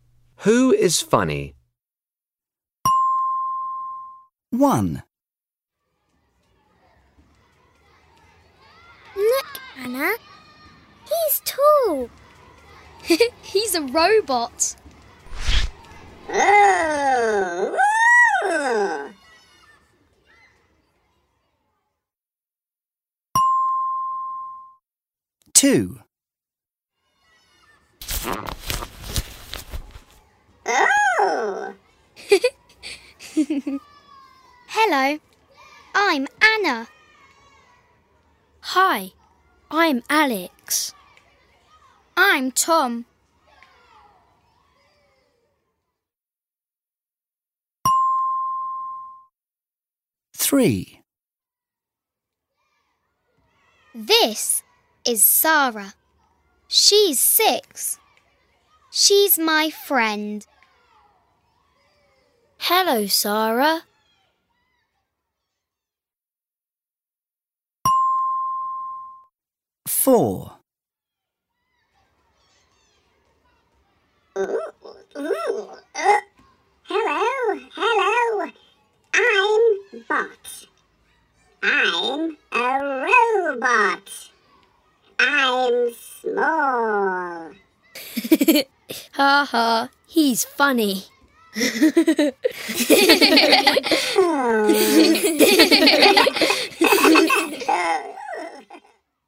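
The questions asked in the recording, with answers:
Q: Who is funny?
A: Bot, the small robot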